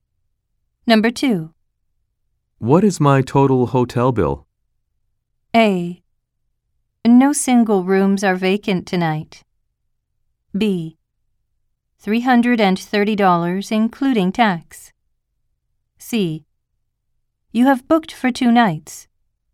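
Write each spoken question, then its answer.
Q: What is my total hotel bill?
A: B: $330, including tax.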